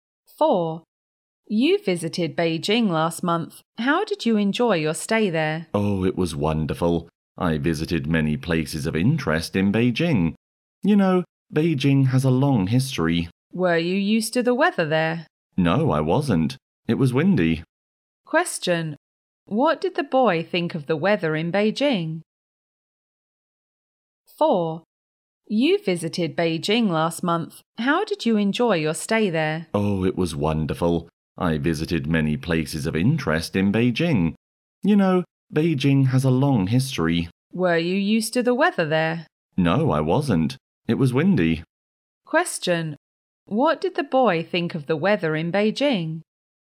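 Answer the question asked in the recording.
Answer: It was windy and he wasn't used to it.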